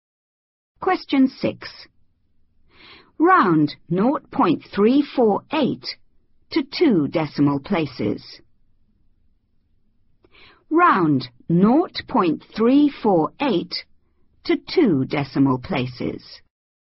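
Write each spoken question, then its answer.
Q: Round 0.348 to 2 decimal places.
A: 0.35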